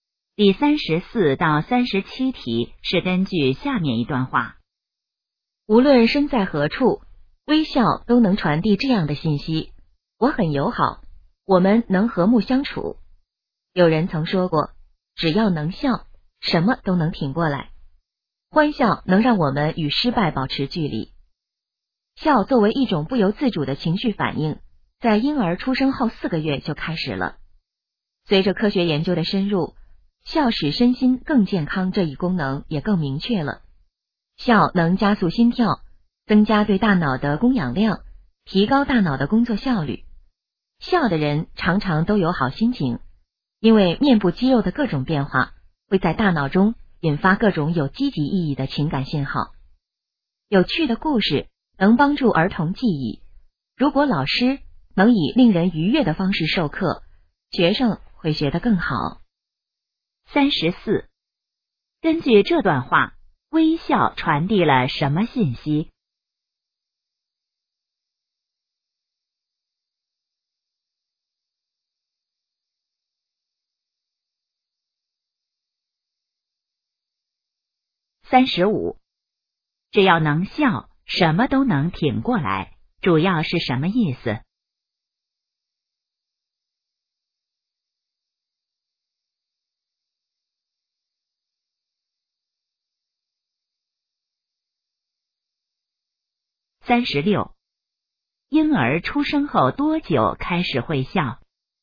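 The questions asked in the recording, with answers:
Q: 根据这段话,微笑传递了什么信息?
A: 我很友好,我们能和睦相处

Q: 婴儿出生后多久开始会笑?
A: 4个月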